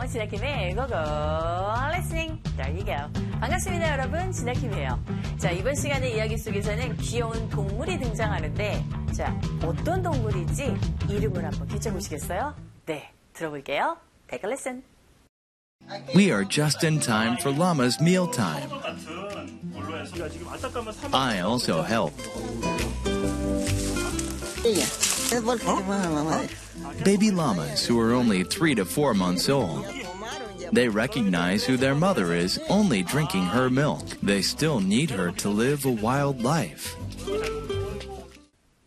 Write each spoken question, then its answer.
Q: 자, 어떤 동물인지 이름을 한번 붙여보시겠어요?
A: 네, 귀여운 야마라 불리는 라마라는 동물입니다.